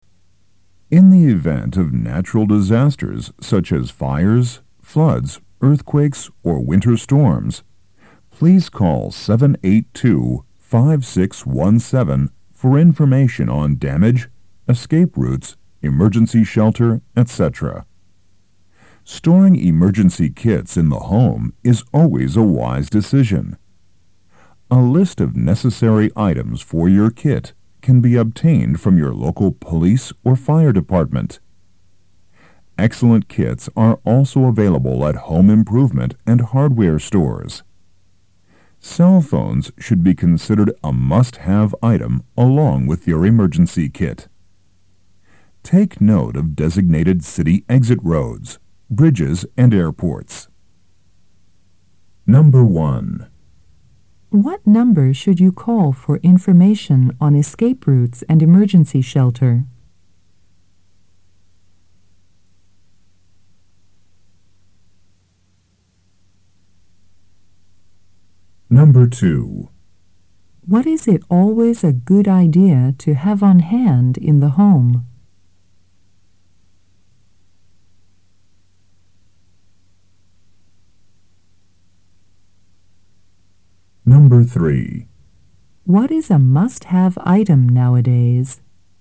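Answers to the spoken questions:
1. 782-5617
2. An emergency kit
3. A cell phone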